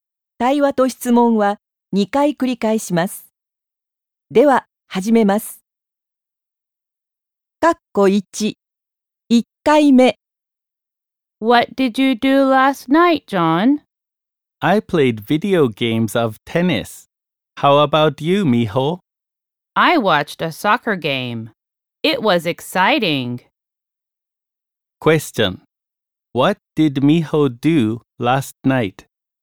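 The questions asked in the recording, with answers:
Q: What did Miho do last night?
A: She watched a soccer game.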